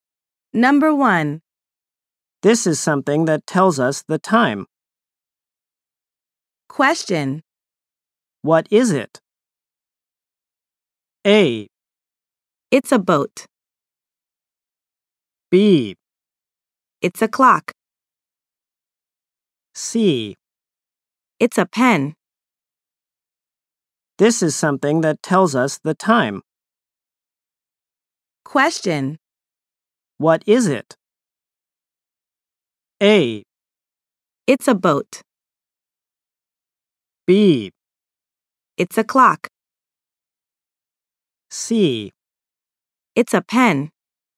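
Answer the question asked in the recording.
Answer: B: It's a clock.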